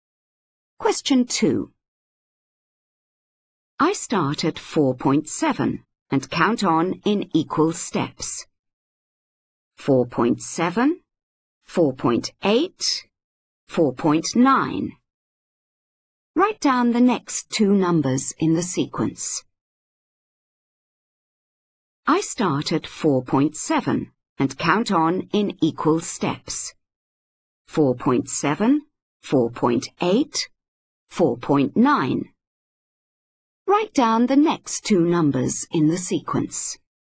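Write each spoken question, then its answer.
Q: Write down the next two numbers in the sequence.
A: 5.0, 5.1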